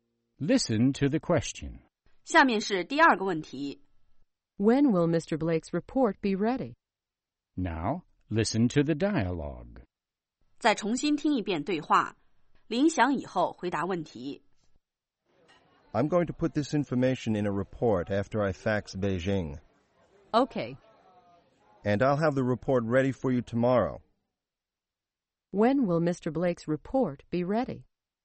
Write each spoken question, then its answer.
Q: When will Mr. Blake's report be ready?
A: It will be ready tomorrow.